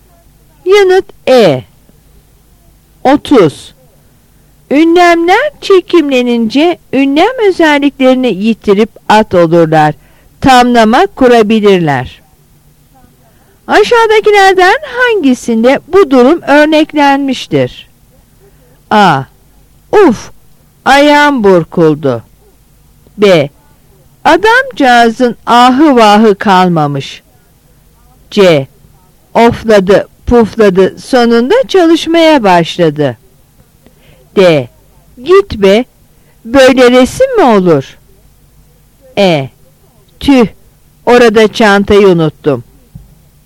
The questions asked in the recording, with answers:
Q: Aşağıdakilerden hangisinde bu durum örneklenmiştir?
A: Yanıt B.